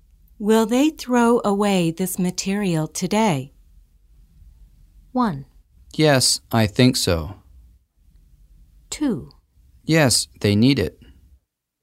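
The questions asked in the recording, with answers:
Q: Will they throw away this material today?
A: 1: Yes, I think so.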